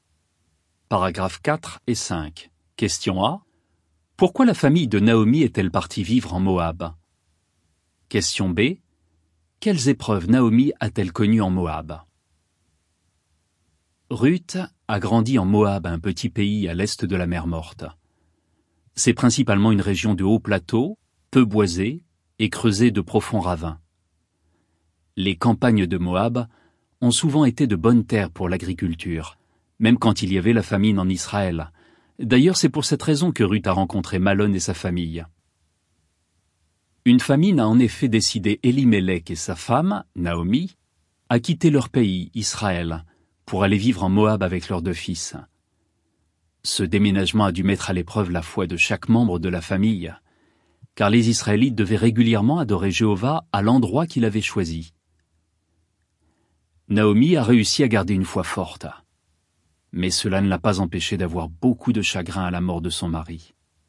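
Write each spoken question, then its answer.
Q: Pourquoi la famille de Naomi est-elle partie vivre en Moab?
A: À cause d'une famine en Israël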